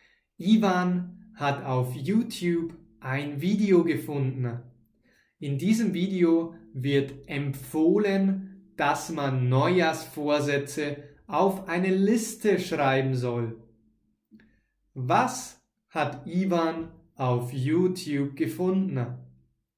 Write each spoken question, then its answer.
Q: Was hat Ivan auf YouTube gefunden?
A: Ein Video. Ivan hat auf YouTube ein Video gefunden.